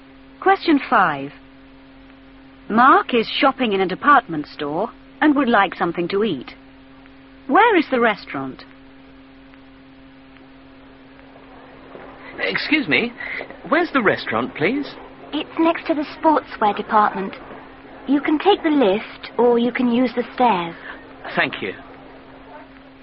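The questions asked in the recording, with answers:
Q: Where is the restaurant?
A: Next to the sportswear department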